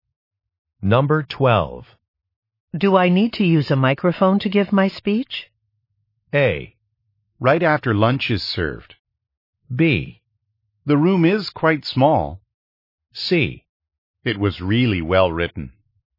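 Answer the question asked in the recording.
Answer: B: The room is quite small.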